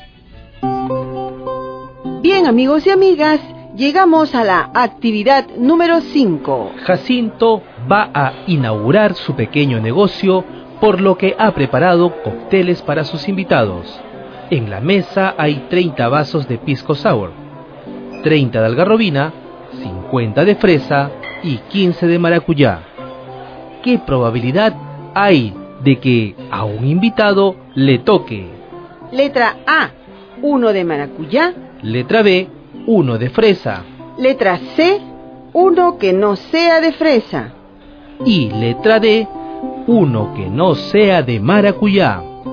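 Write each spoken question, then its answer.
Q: Letra A, 1 de maracuyá.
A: 15/125 = 12%

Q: Letra B, 1 de fresa.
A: 50/125 = 40%

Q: Letra C, 1 que no sea de fresa.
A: 75/125 = 60%

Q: Y letra D, 1 que no sea de maracuyá.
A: 110/125 = 88%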